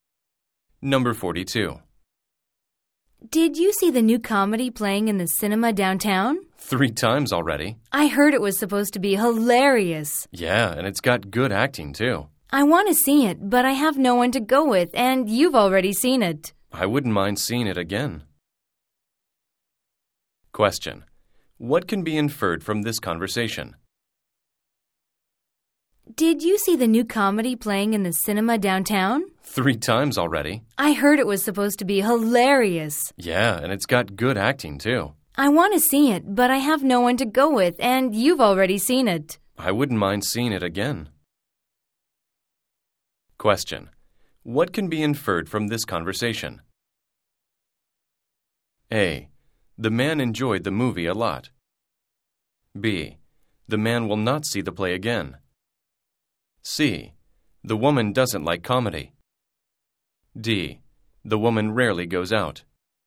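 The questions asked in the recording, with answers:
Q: What can be inferred from this conversation?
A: A: The man enjoyed the movie a lot.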